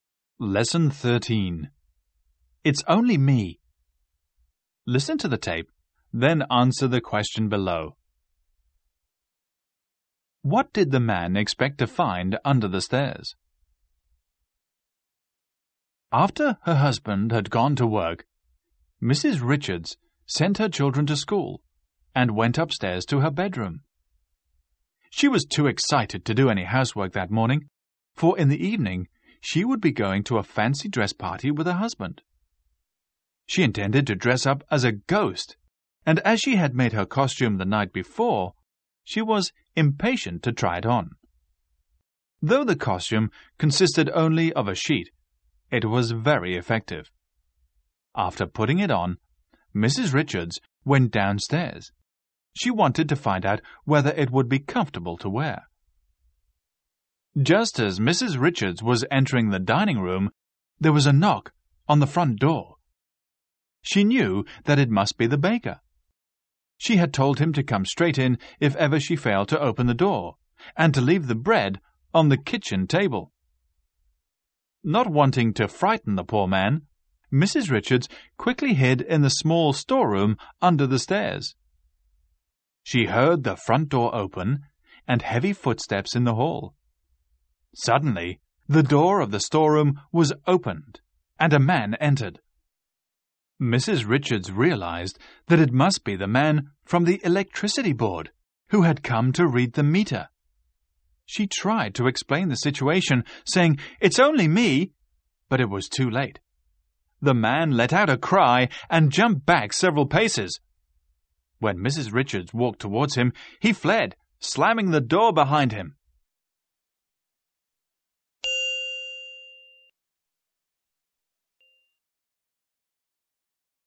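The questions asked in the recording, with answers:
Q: What did the man expect to find under the stairs?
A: The electricity meter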